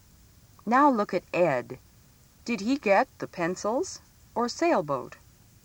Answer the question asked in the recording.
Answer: Ed got the pencils, didn't he?